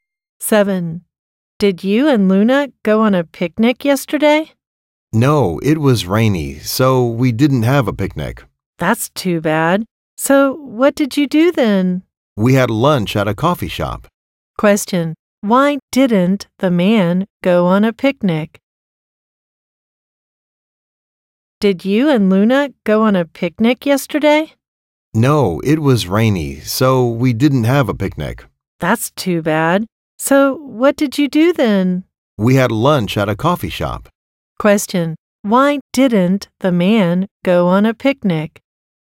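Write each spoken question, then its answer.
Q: why didn't the man go on a picnic?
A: Because it was rainy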